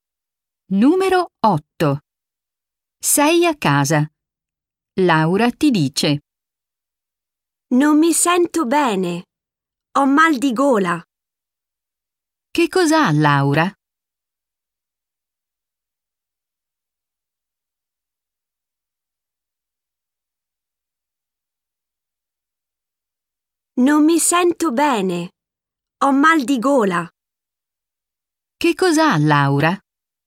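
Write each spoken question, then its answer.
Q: Che cos'ha, Laura?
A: Mal di gola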